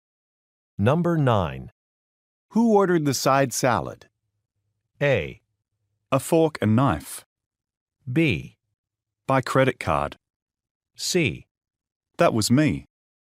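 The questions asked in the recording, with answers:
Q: Who ordered the side salad?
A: C: That was me.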